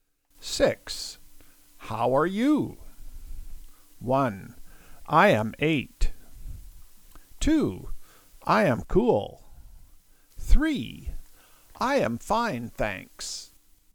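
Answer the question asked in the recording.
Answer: 3: I am fine, thanks.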